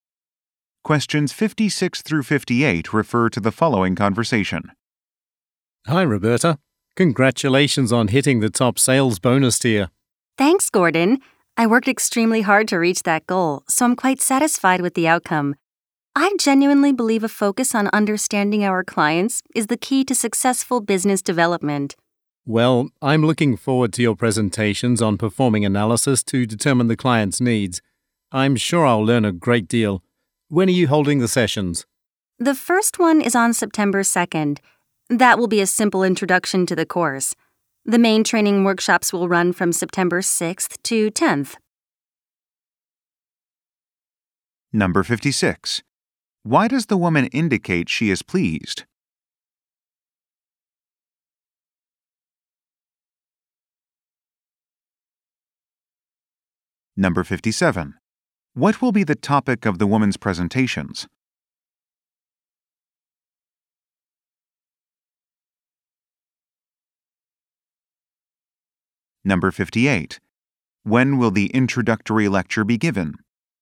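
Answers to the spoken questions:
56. She reached the top sales bonus tier
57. Analyzing clients' needs
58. September 2nd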